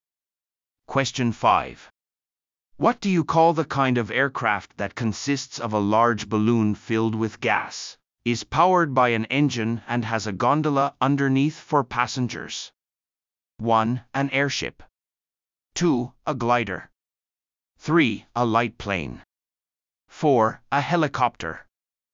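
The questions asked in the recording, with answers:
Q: What do you call the kind of aircraft that consists of a large balloon filled with gas, is powered by an engine and has a gondola underneath for passengers?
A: 1: An airship.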